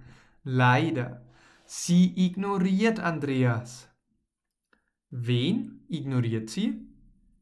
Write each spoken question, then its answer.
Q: Wen ignoriert sie?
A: Andreas. Sie ignoriert Andreas.